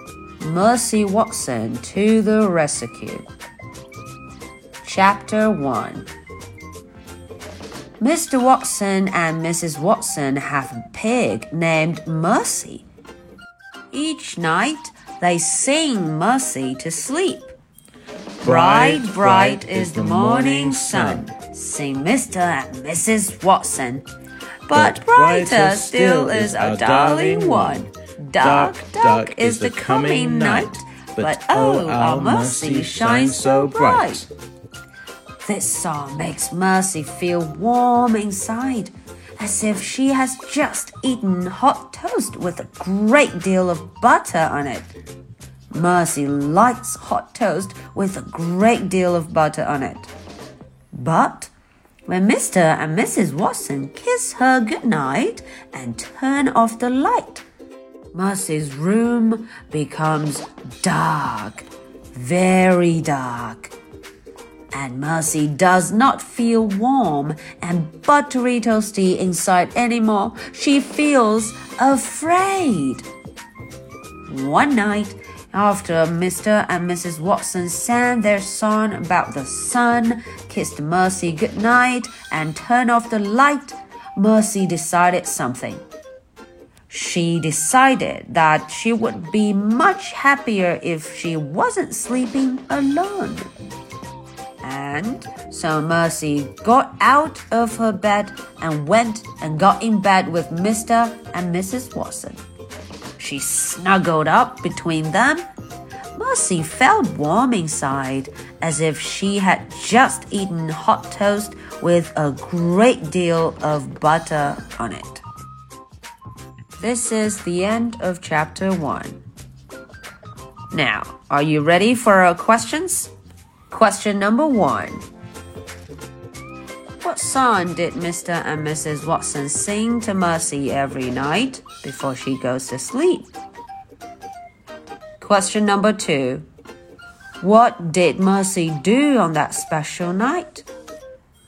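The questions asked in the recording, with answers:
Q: What song did Mr. and Mrs. Watson sing to Mercy every night before she goes to sleep?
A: A song about the sun: "Bright, bright is the morning sun..."

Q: What did Mercy do on that special night?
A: She got out of her bed and got in bed with Mr. and Mrs. Watson, snuggling between them.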